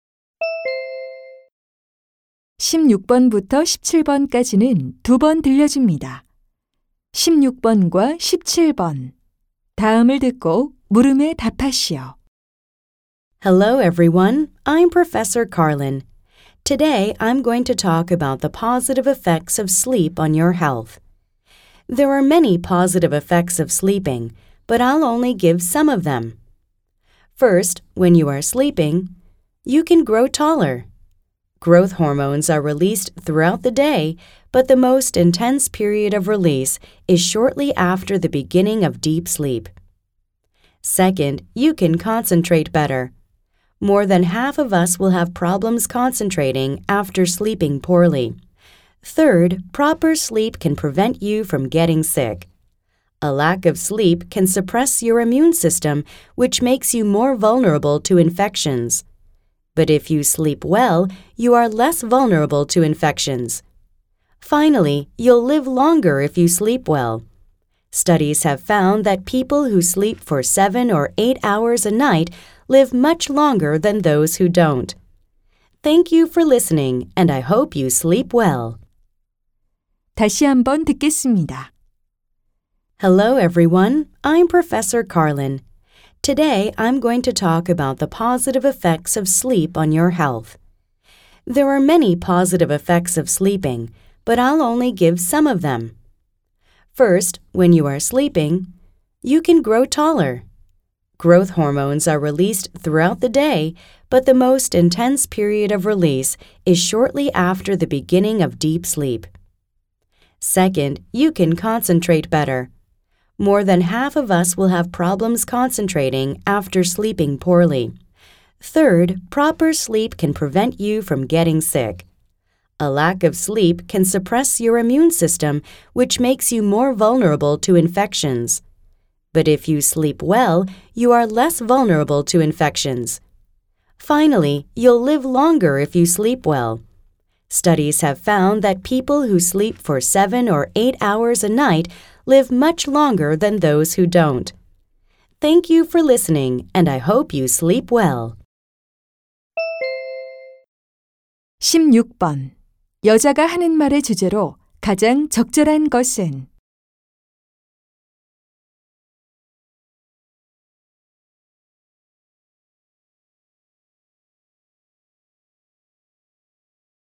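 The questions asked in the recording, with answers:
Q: 여자가 하는 말의 주제로 가장 적절한 것은?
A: 수면이 건강에 미치는 긍정적 효과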